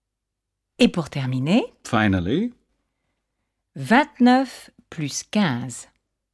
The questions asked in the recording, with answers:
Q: 29 plus 15.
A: Ça fait 44.